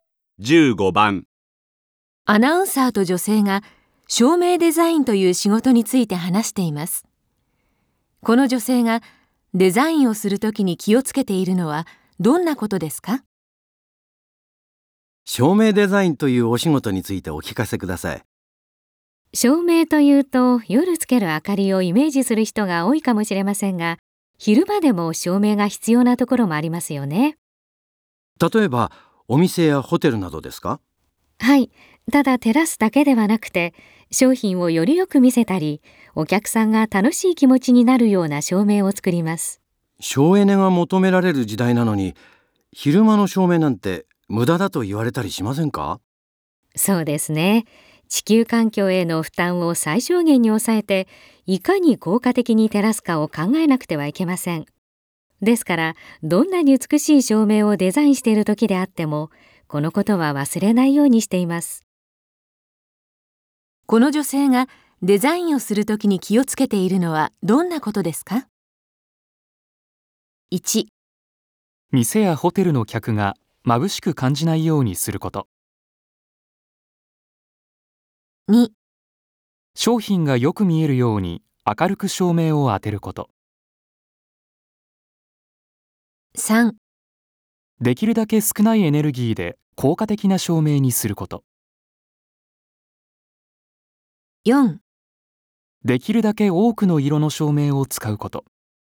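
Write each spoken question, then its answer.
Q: この女性がデザインをする時に気をつけているのはどんなことですか?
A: 3: できるだけ少ないエネルギーで効果的な照明にすること。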